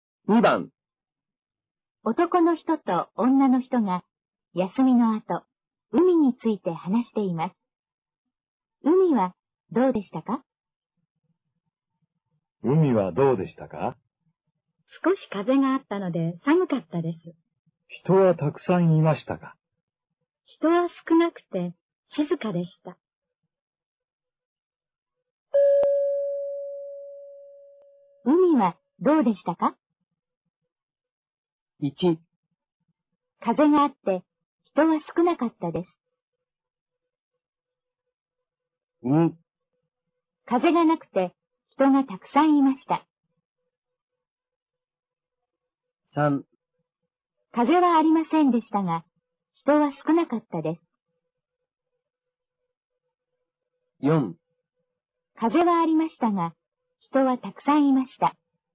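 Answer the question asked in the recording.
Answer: 1: 風があって人は少なかったです。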